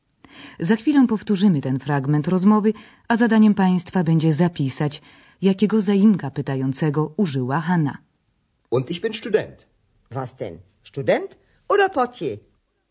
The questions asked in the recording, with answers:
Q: zadaniem Państwa będzie zapisać, jakiego zaimka pytającego użyła Hanna.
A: Pokojówka Hanna użyła zaimka pytającego was, po polsku co.